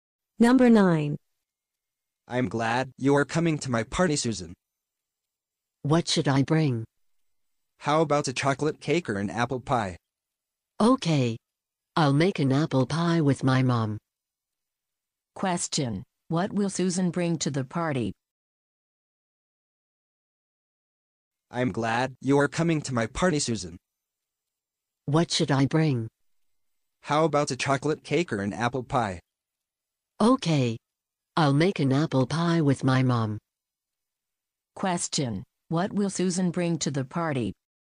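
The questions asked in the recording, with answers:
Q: What will Susan bring to the party?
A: An apple pie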